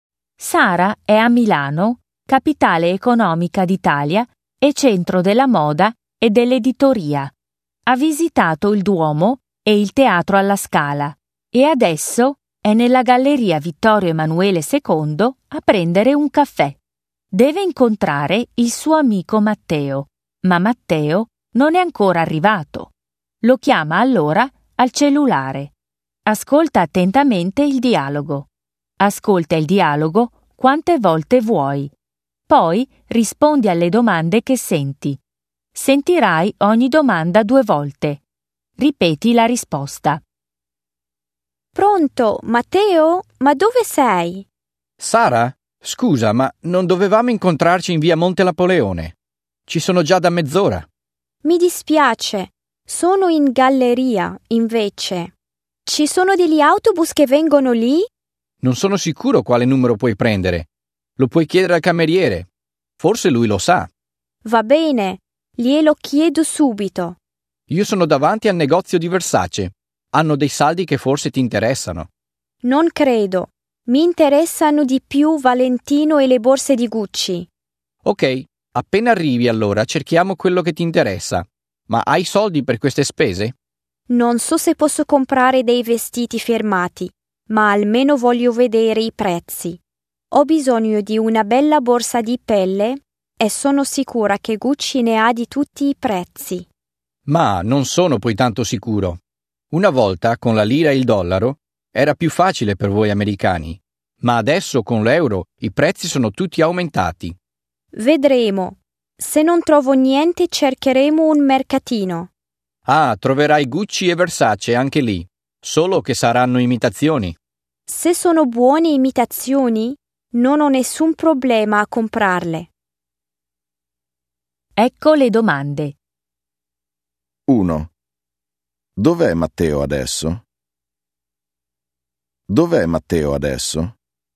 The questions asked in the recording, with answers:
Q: Dov'è Matteo adesso?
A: È in via Monte Napoleone.